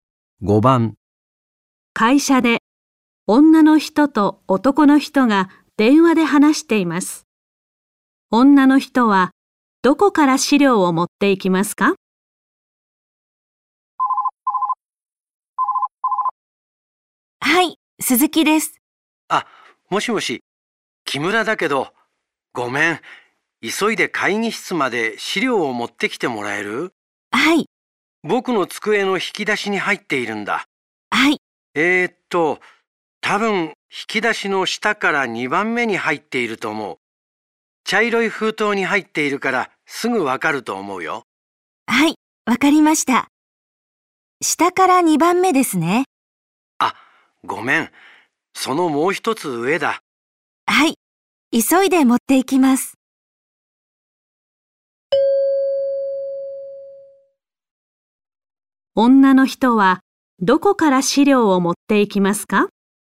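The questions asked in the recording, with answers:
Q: 女の人はどこから資料を持っていきますか?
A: 男の人の机の引き出しの下から3番目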